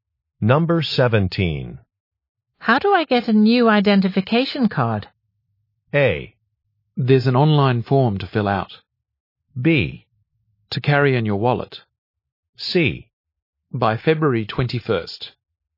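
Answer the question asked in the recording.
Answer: A: There's an online form to fill out.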